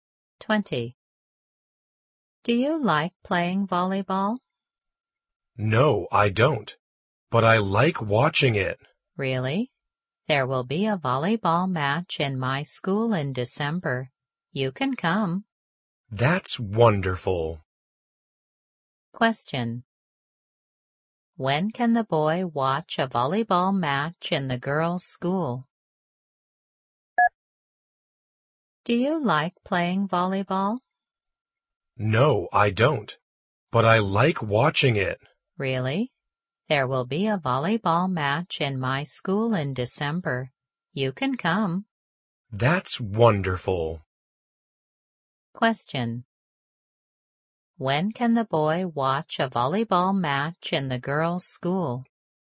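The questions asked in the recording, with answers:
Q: When can the boy watch a volleyball match in the girls' school?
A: In December.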